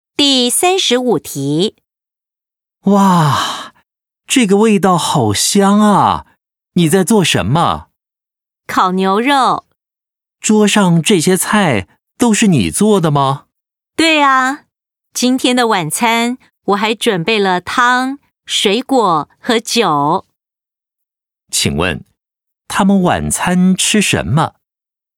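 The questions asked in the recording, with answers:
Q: 请问,他们晚餐吃什么?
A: 烤牛肉、汤、水果和酒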